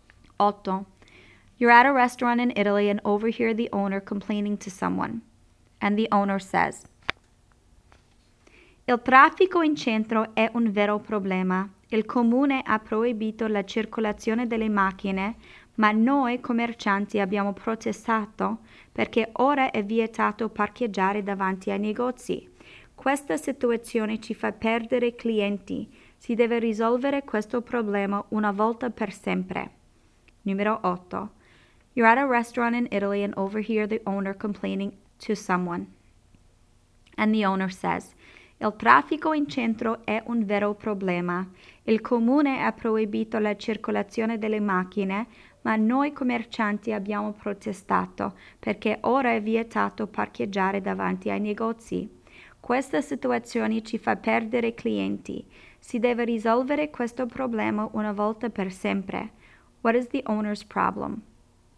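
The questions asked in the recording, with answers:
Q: What is the owner's problem?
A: No parking is allowed in front of the shops, so he is losing customers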